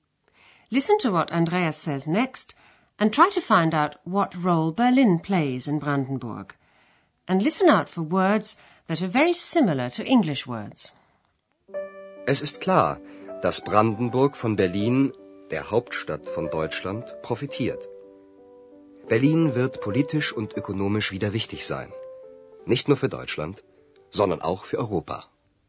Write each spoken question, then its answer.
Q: Listen to what Andreas says next and try to find out what role Berlin plays in Brandenburg.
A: Brandenburg will profit, profitieren, from the fact that Berlin is the capital of Germany.